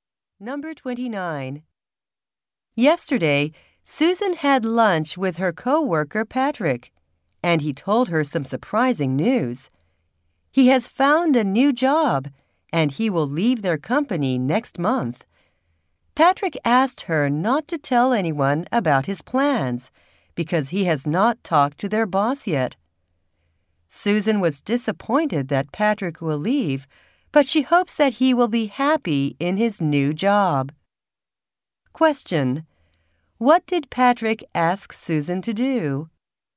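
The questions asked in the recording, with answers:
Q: What did Patrick ask Susan to do?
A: Not tell anyone about his plans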